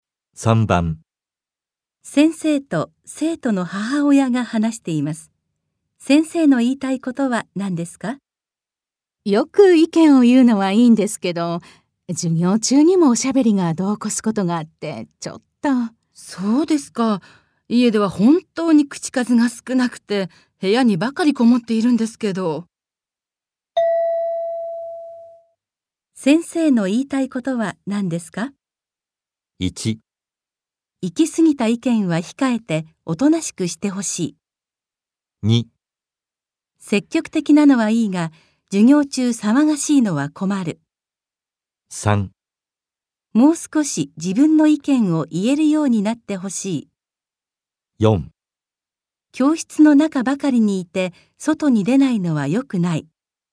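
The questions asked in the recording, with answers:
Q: 先生の言いたいことは何ですか?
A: 2: 積極的なのはいいが授業中騒がしいのは困る。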